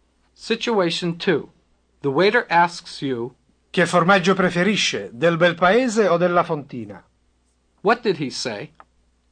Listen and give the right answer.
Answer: He said, what cheese do you prefer, some bel paese or some fontina?